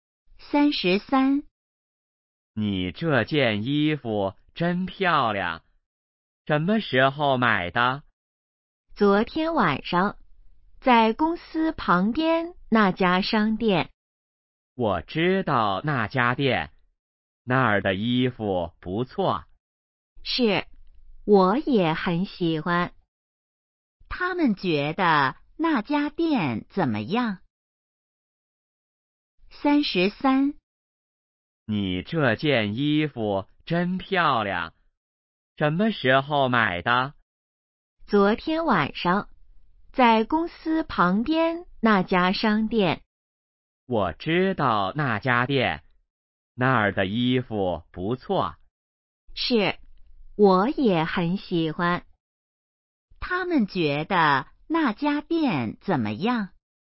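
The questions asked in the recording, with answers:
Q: 他们觉得那家店怎么样?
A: 衣服不错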